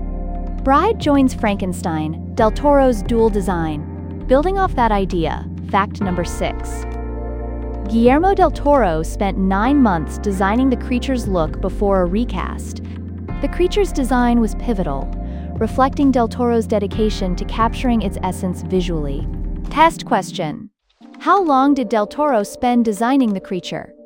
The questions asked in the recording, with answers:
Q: how long did del Toro spend designing the creature?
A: 9 months.